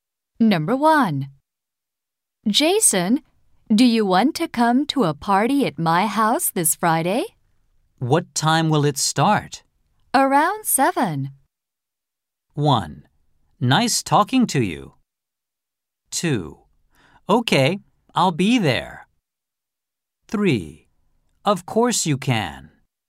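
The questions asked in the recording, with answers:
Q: Around 7.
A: 2: Okay, I'll be there.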